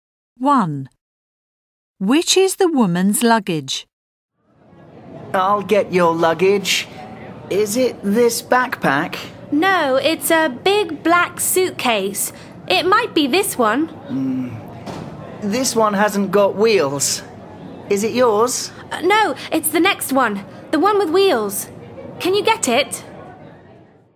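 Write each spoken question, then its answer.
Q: Which is the woman's luggage?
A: The big black suitcase with wheels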